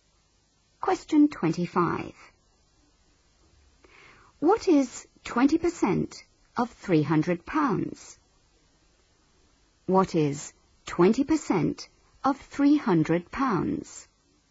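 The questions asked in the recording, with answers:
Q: What is 20% of £300?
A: £60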